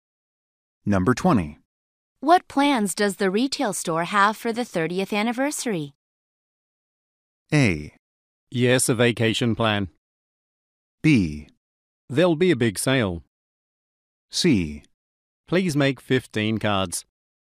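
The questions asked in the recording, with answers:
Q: What plans does the retail store have for the 30th anniversary?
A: B: There'll be a big sale.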